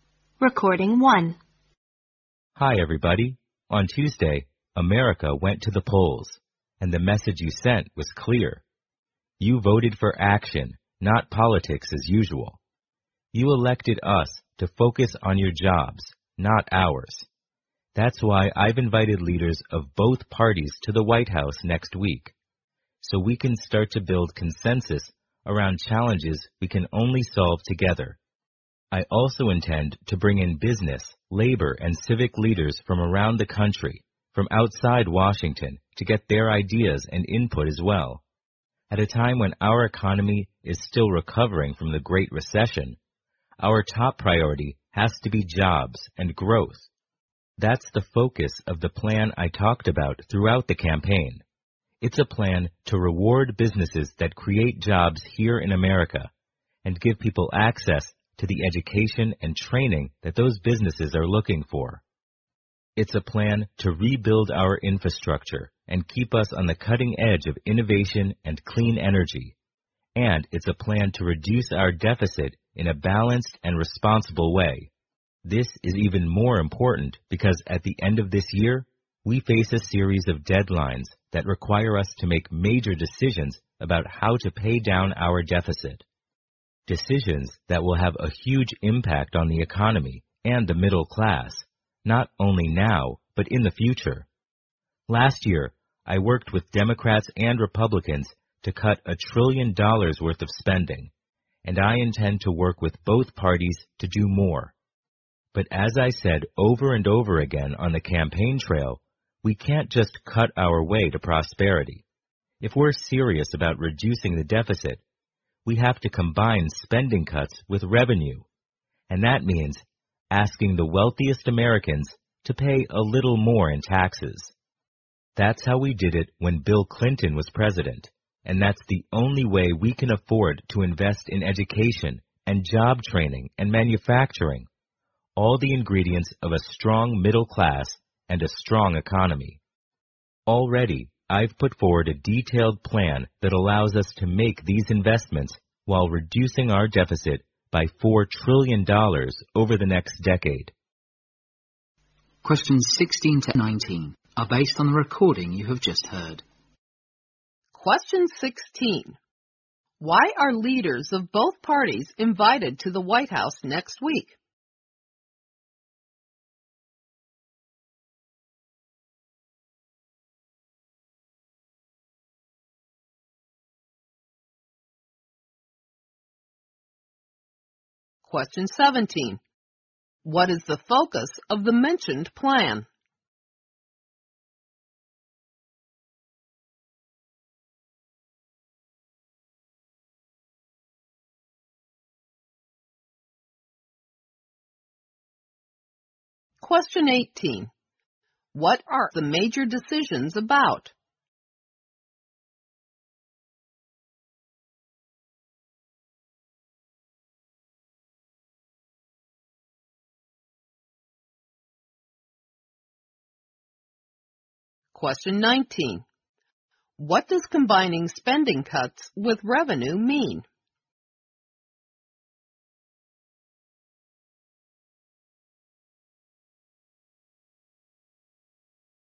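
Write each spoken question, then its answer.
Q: Why are leaders of both parties invited to the White House next week?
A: To build consensus on challenges they can only solve together

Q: What is the focus of the mentioned plan?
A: Jobs and growth

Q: What are the major decisions about?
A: How to pay down the deficit

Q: What does combining spending cuts with revenue mean?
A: Asking the wealthiest Americans to pay a little more in taxes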